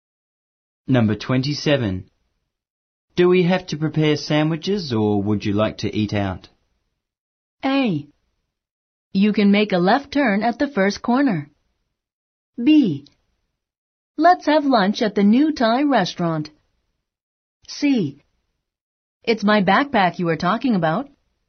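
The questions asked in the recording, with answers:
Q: Do we have to prepare sandwiches or would you like to eat out?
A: B: Let's have lunch at the new Thai restaurant.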